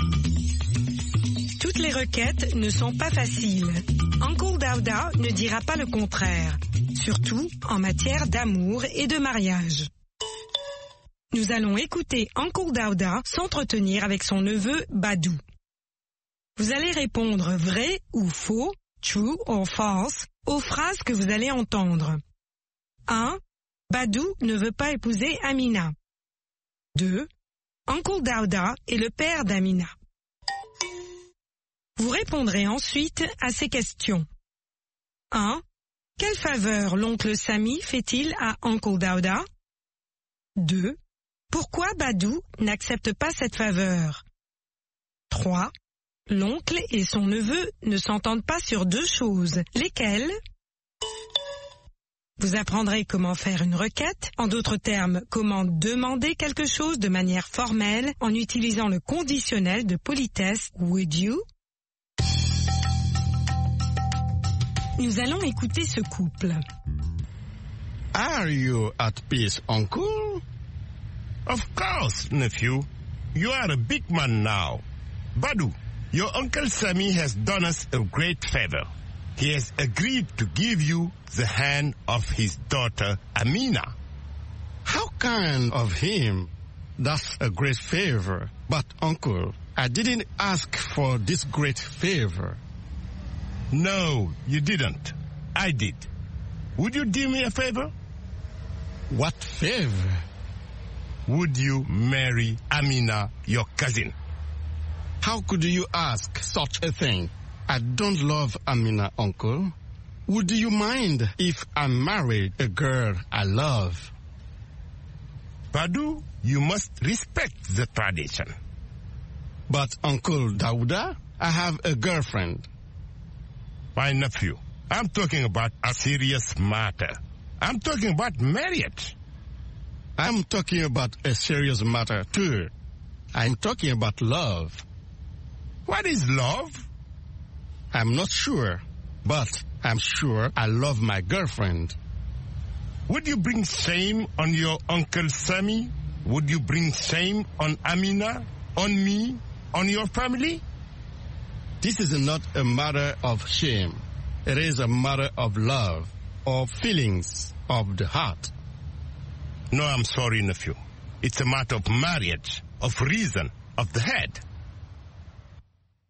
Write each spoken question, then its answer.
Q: Badou ne veut pas épouser Amina.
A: L'énoncé 1 est vrai. Badou ne veut pas épouser Amina.

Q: Uncle Dauda est le père d'Amina.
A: L'énoncé 2 est faux. Uncle Dauda est le père d'Amina.

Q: Quelle faveur l'oncle Sami fait-il à Uncle Dauda?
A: Il accepte d'accorder la main de sa fille à Badou.

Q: L'oncle et son neveu ne s'entendent pas sur deux choses.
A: Sur le mariage et sur l'amour.